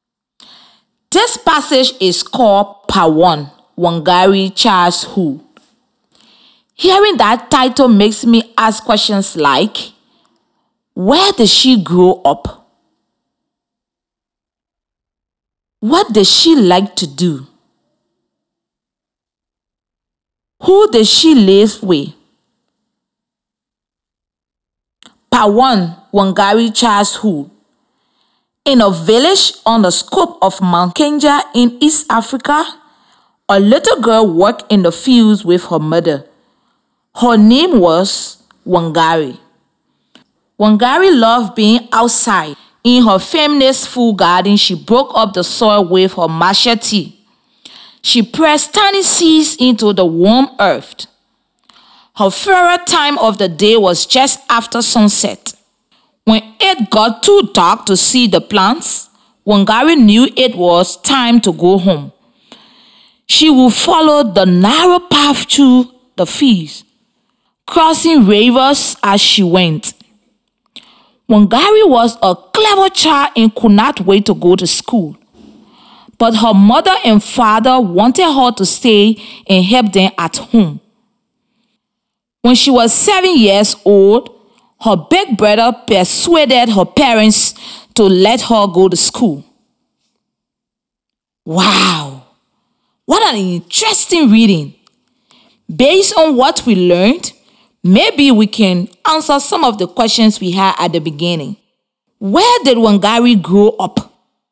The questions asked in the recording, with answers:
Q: Where did Wangari grow up?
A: Wangari grew up in Kenya in East Africa.